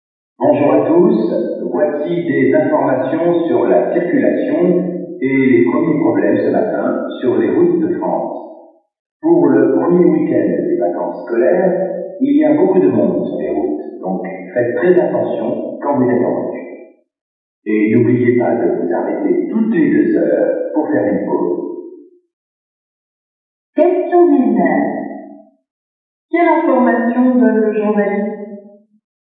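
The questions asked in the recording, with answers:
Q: Quelle information donne le journaliste?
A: Il y a beaucoup de monde sur les routes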